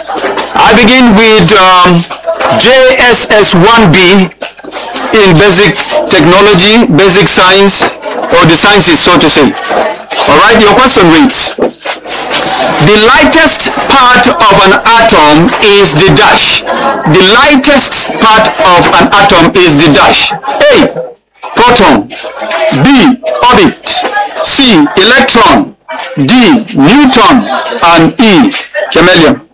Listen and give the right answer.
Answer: Electron!